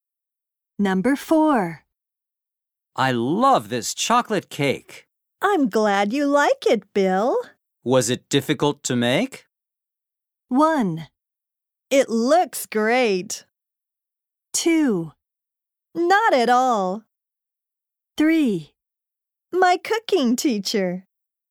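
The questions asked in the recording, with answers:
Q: Was it difficult to make?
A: 2: Not at all.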